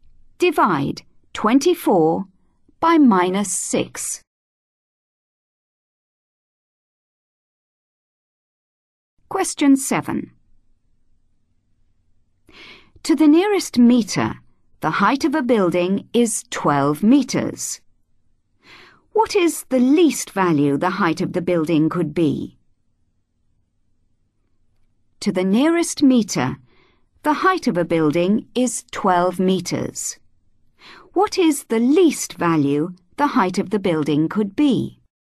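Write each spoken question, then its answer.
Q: What is the least value the height of the building could be?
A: 11.5 metres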